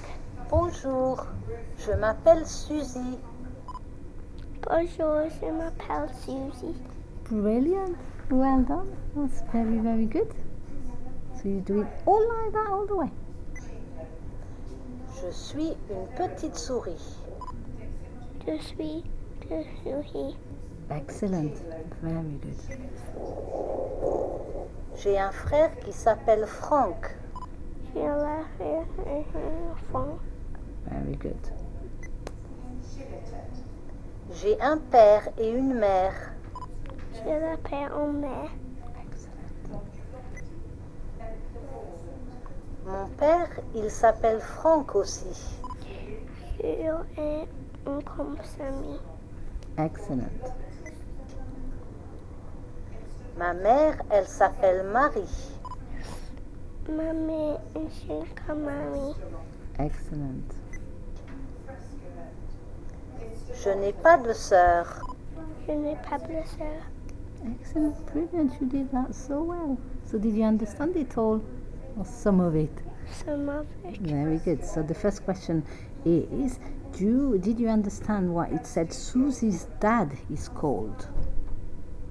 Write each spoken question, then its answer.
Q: So the first question is, did you understand what it said Susie's dad is called?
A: mon père, il s'appelle Franck aussi.